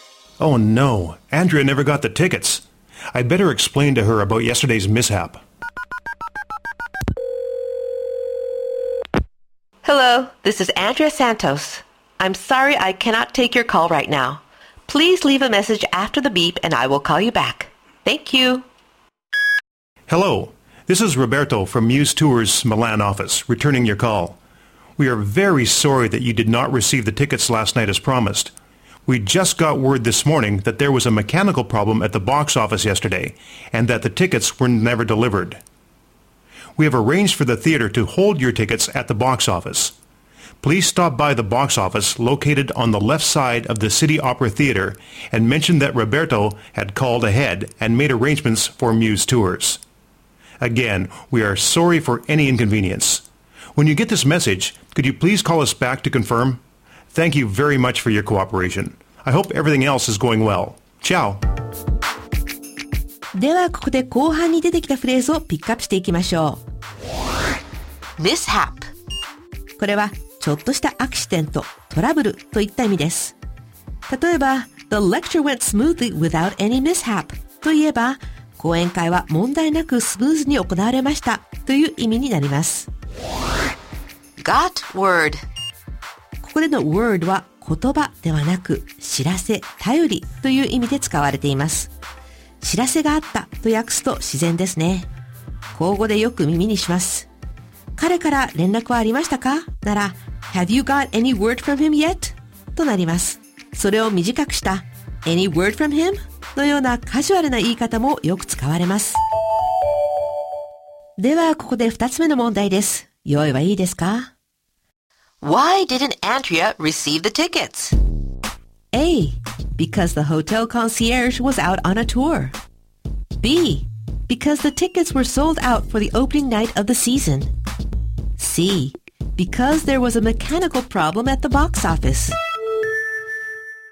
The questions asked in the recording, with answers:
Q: Why didn't Andrea receive the tickets?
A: 正解は C。チケット売り場で機械のトラブルがあったからです。